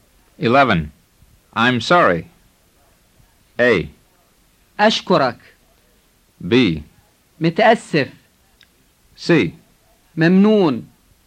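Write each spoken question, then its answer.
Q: I'm sorry.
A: B: متأسف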